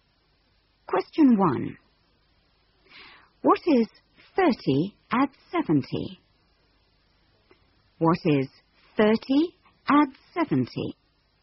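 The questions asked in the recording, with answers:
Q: What is 30 add 70?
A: 100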